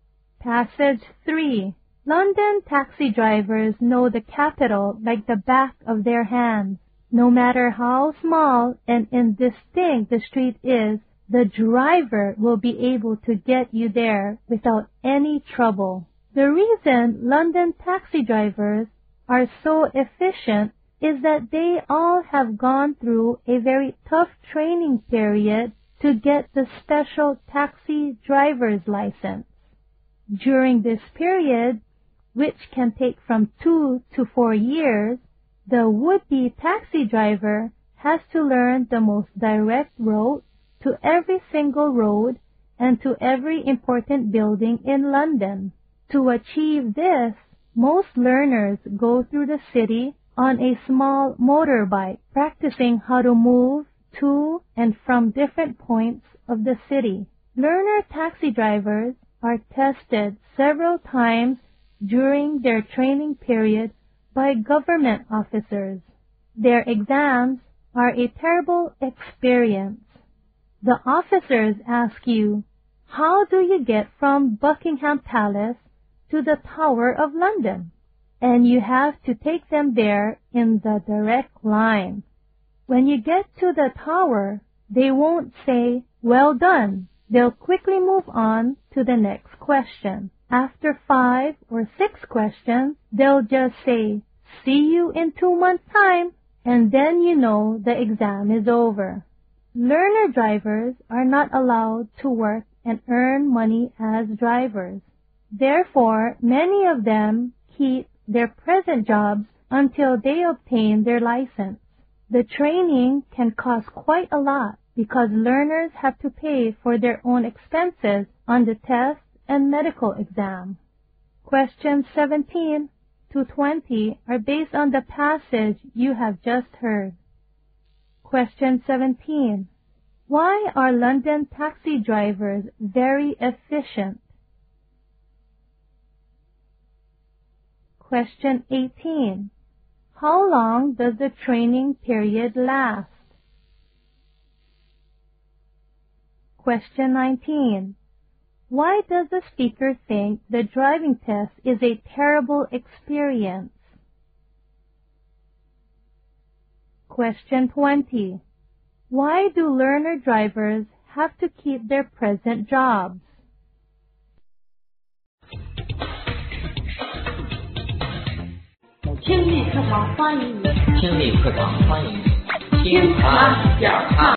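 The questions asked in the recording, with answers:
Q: Why are London taxi drivers very efficient?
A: They go through very tough training to get a special license.

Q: How long does the training period last?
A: From 2 to 4 years.

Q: Why do learner drivers have to keep their present jobs?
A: They aren't allowed to earn money as drivers, and the training is expensive.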